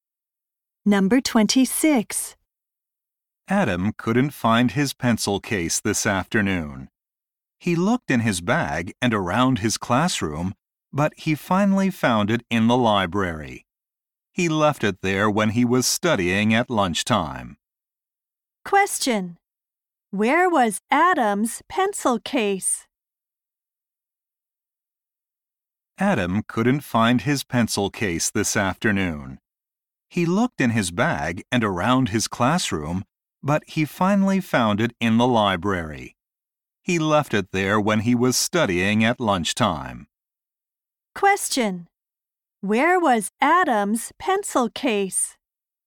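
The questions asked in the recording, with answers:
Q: Where was Adam's pencil case?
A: In the library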